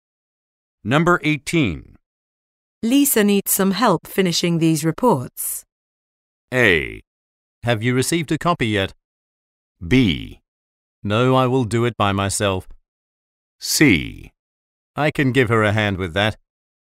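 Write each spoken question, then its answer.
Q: Lisa needs some help finishing these reports.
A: C: I can give her a hand with that.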